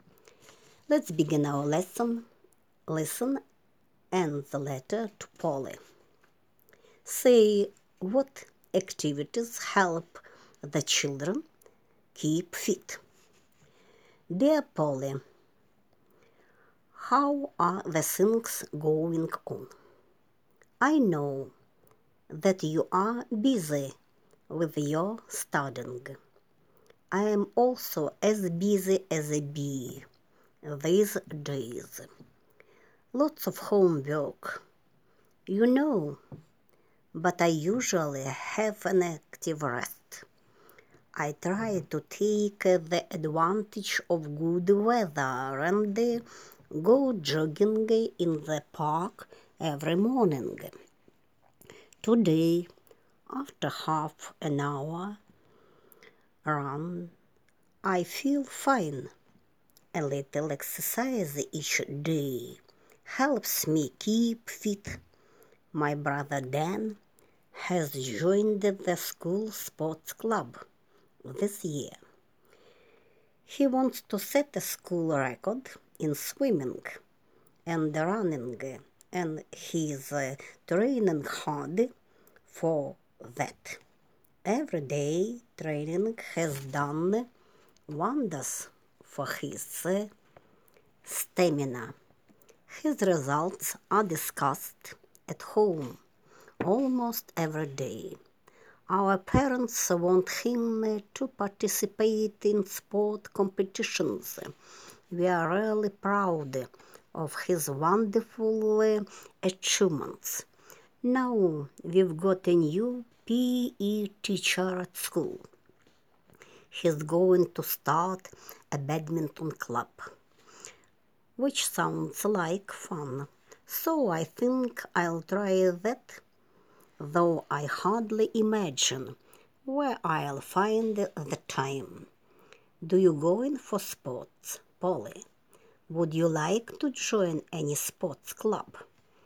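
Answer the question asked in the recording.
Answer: Jogging in the park every morning, swimming and running training, and badminton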